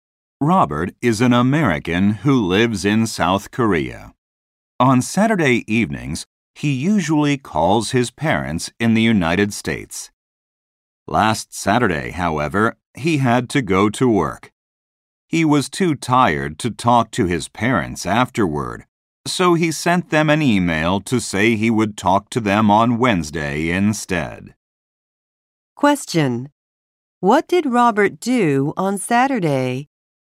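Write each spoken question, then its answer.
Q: What did Robert do on Saturday?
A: He went to work (and emailed his parents instead of calling).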